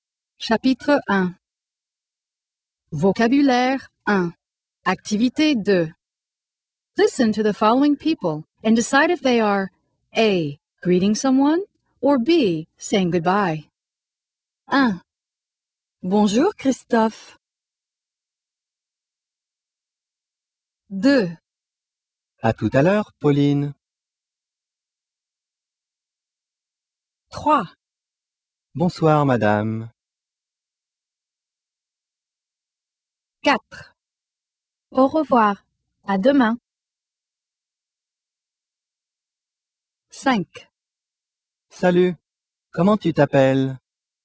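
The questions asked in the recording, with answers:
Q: Bonjour Christophe.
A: A: greeting someone

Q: À tout à l'heure, Pauline.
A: B: saying goodbye

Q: Bonsoir, madame.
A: A: greeting someone

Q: Au revoir. À demain.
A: B: saying goodbye

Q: Salut. Comment tu t'appelles?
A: A: greeting someone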